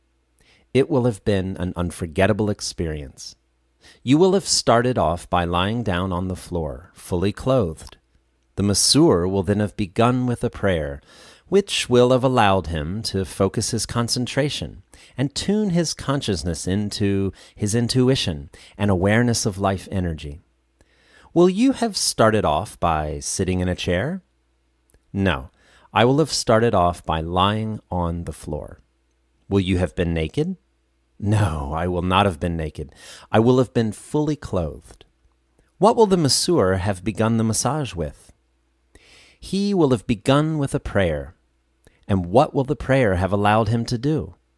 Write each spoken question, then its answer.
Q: Will you have started off by sitting in a chair?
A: No, I will have started off by lying on the floor.

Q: Will you have been naked?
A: No, I will not have been naked.

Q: And what will the prayer have allowed him to do?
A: The prayer will have allowed him to focus his concentration.